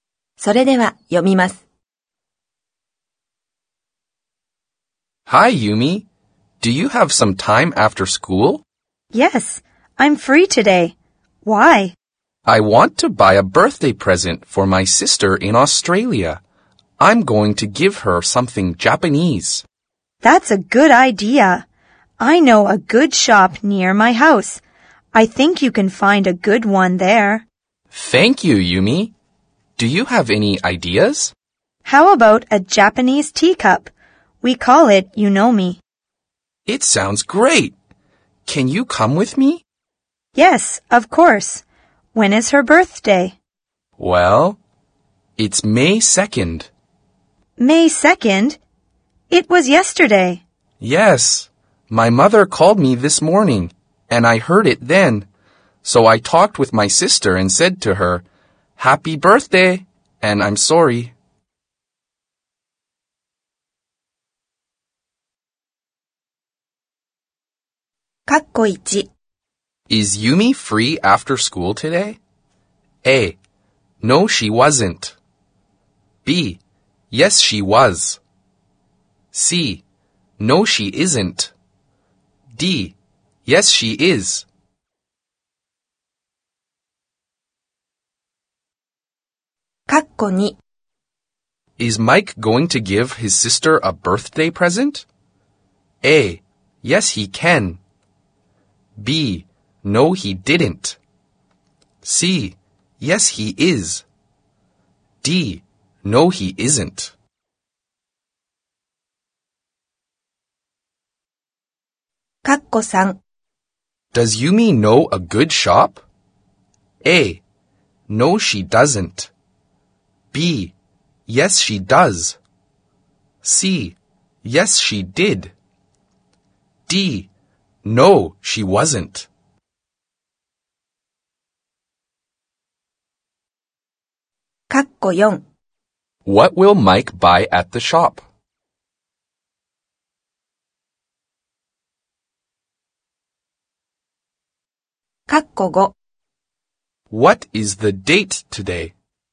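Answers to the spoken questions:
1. D: Yes, she is.
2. C: Yes, he is.
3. B: Yes, she does.
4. A Japanese teacup (yunomi).
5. May 3rd.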